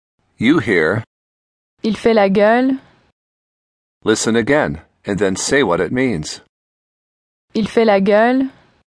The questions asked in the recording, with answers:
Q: Listen again, and then say what it means.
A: He is PO'd.